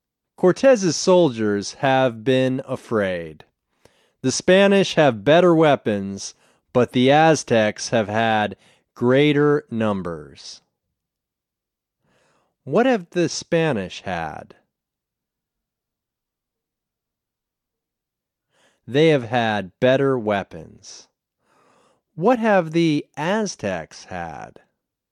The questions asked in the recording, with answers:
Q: What have the Aztecs had?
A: They have had greater numbers.